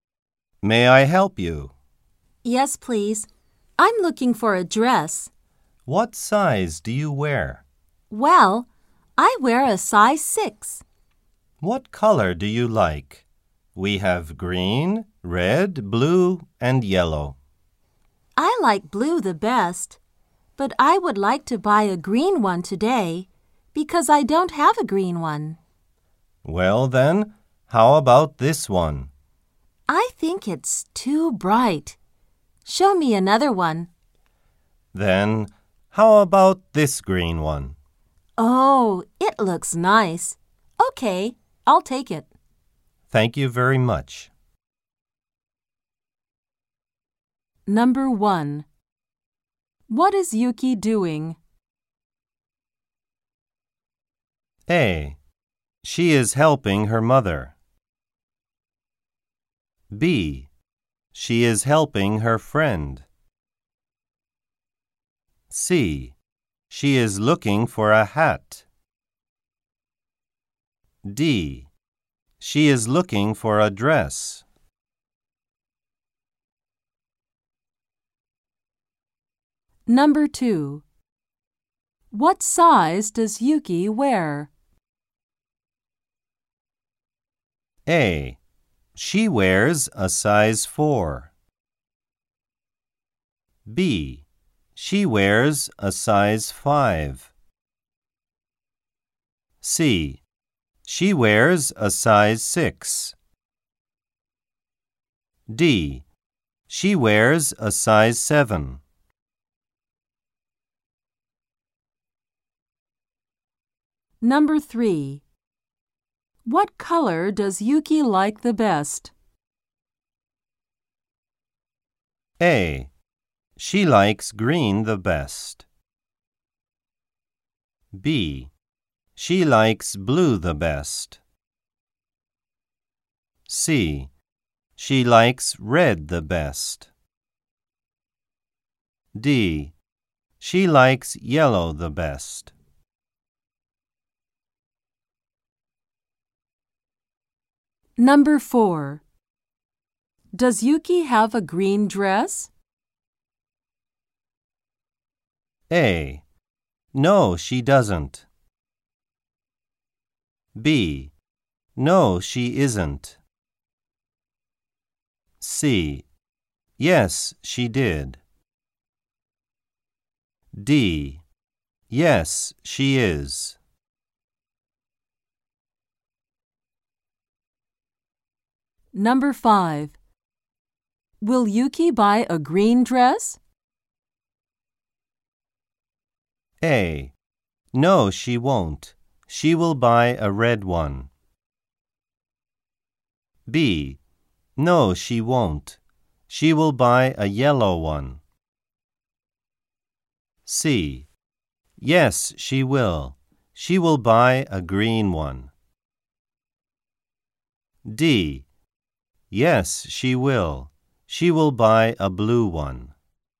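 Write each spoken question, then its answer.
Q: What is Yuki doing?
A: D: She is looking for a dress.

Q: What size does Yuki wear?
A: C: She wears a size 6.

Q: What color does Yuki like the best?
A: B: She likes blue the best.

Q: Does Yuki have a green dress?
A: A: No, she doesn't.

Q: Will Yuki buy a green dress?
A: C: Yes, she will. She will buy a green one.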